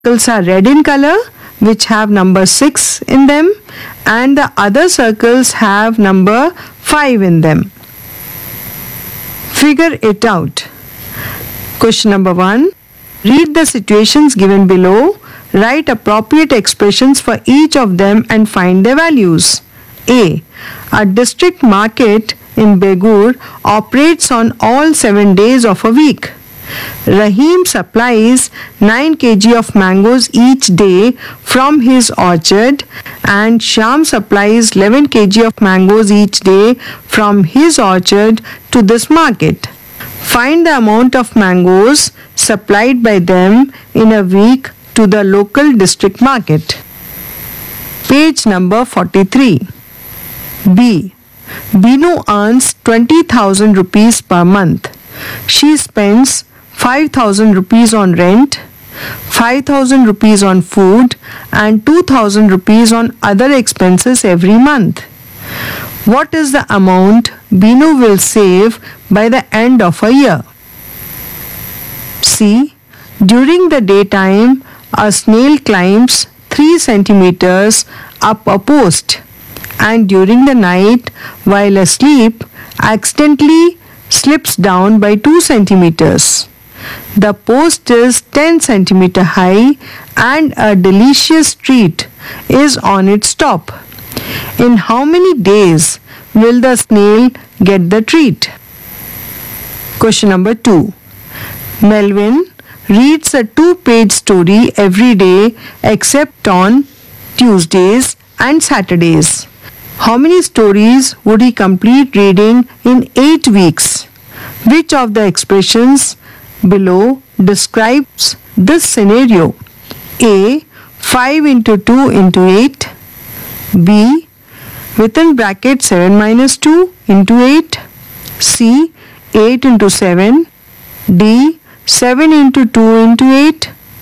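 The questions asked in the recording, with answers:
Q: Find the amount of mangoes supplied by them in a week to the local district market.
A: 140 kg

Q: What is the amount Binu will save by the end of a year?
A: 96,000 rupees

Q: In how many days will the snail get the treat?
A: 8 days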